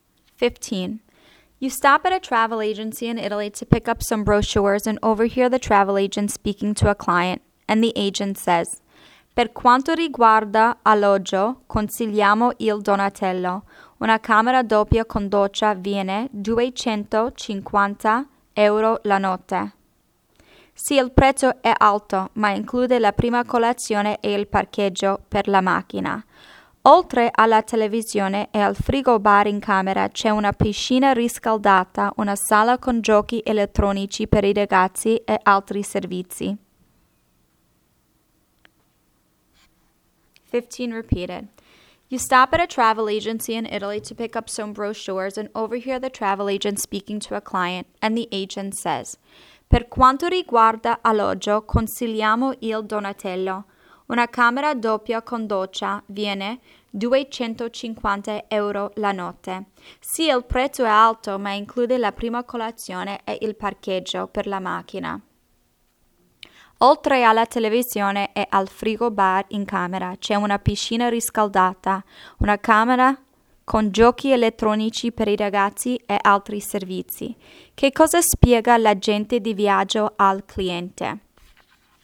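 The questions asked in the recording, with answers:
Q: Che cosa spiega l'agente di viaggio al cliente?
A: Il prezzo e i servizi dell'albergo Donatello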